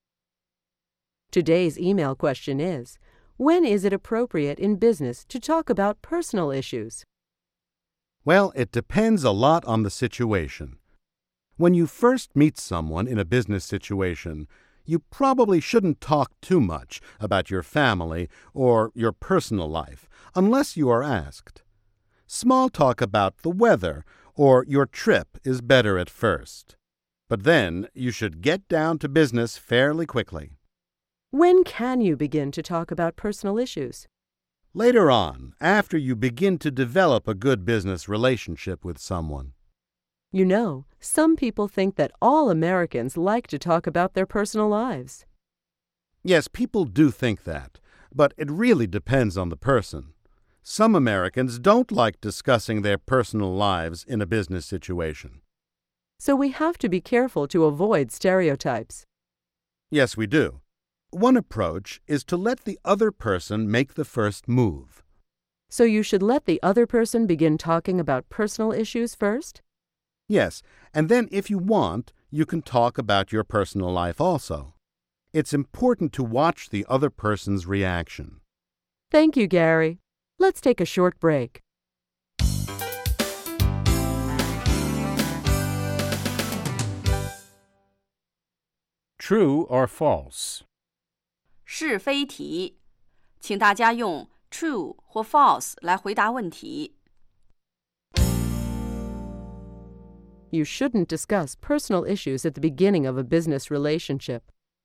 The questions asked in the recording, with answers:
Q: You shouldn't discuss personal issues at the beginning of a business relationship.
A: True. Later on in the relationship, it may be okay.